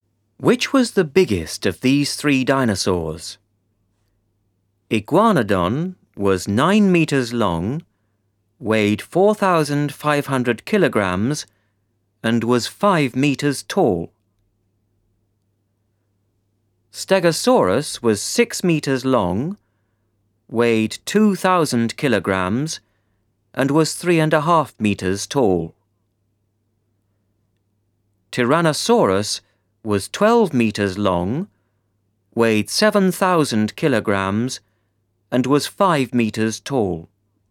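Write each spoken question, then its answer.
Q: Which was the biggest of these three dinosaurs?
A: Tyrannosaurus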